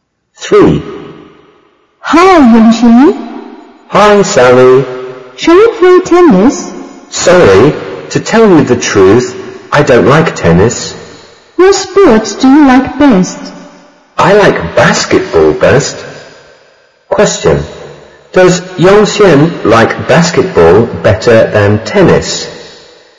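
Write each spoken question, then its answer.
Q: Does Yunxin like basketball better than tennis?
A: Yes, she does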